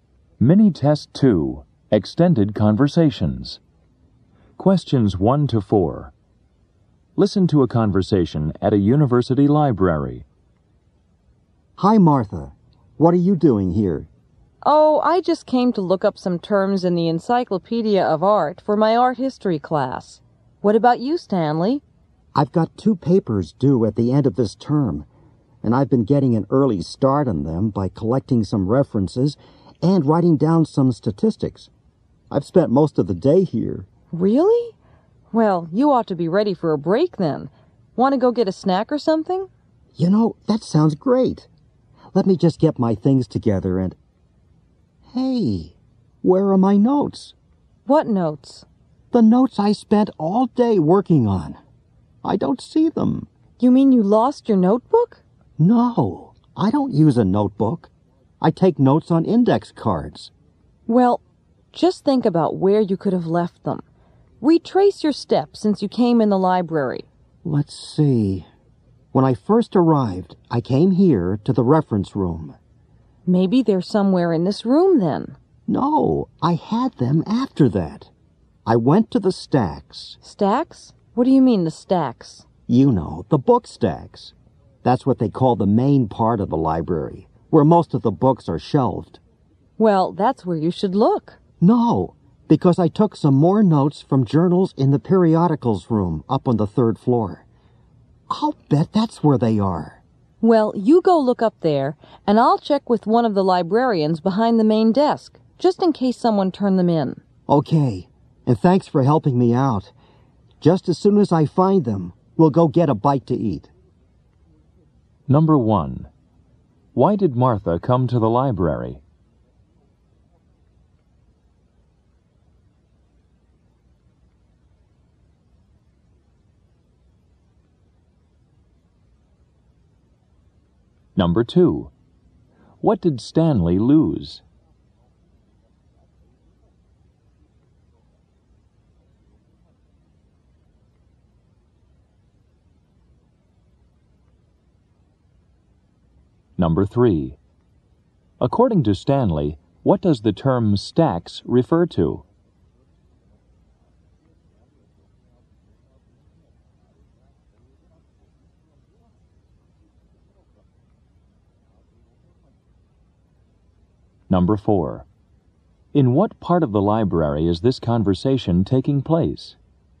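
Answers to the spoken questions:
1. To look up some terms in the Encyclopedia of Art for her art history class
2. His notes on index cards
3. The main part of the library, where most of the books are shelved
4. The reference room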